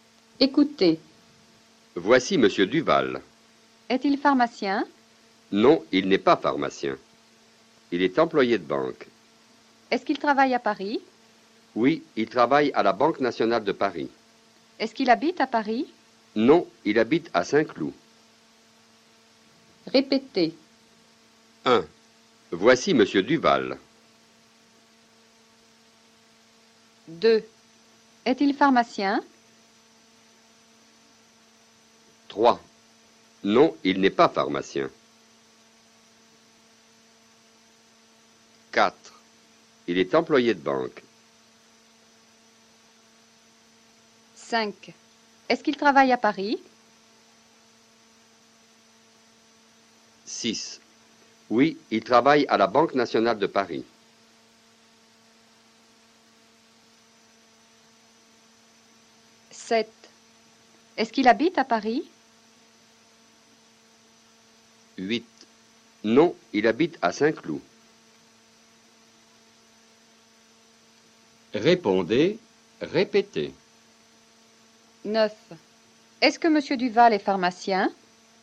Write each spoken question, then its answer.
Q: Est-ce que Monsieur Duval est pharmacien?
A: Non, il n'est pas pharmacien.